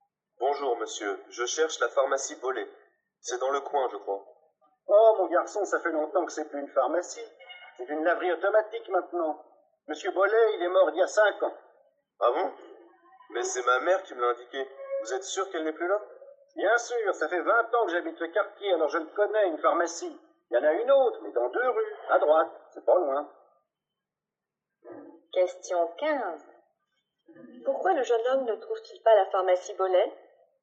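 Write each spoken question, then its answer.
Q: Pourquoi le jeune homme ne trouve-t-il pas la pharmacie Bollé?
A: Parce qu'elle n'existe plus : c'est maintenant une laverie automatique.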